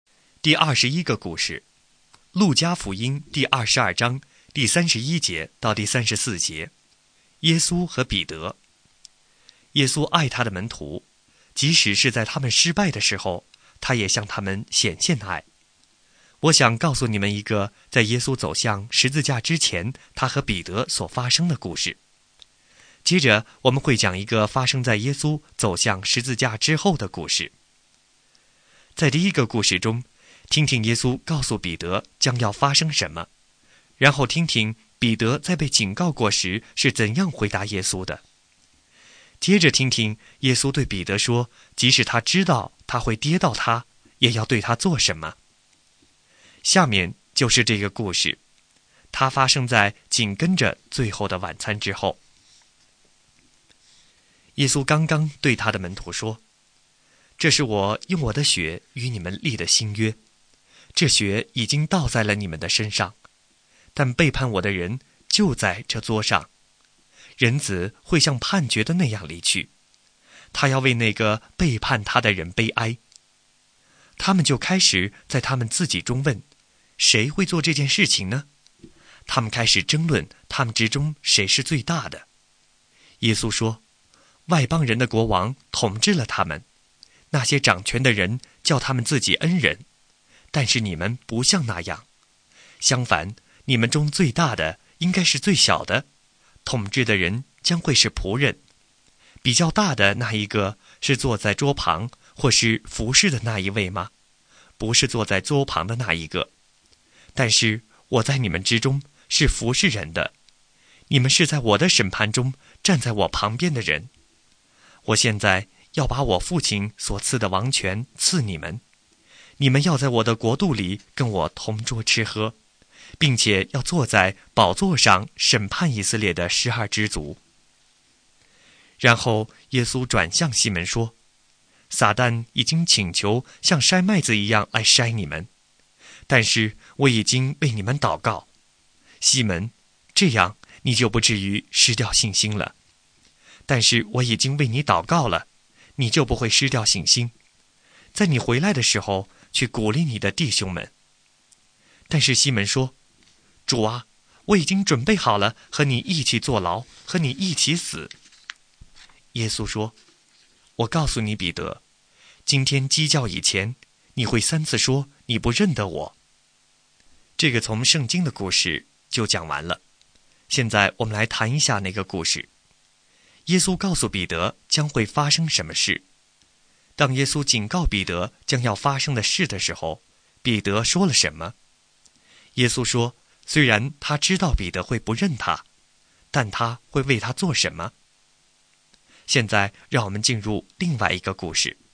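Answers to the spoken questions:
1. 主啊,我已经准备好了和你一起坐牢,和你一起死。
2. 为他祷告,使他不至于失掉信心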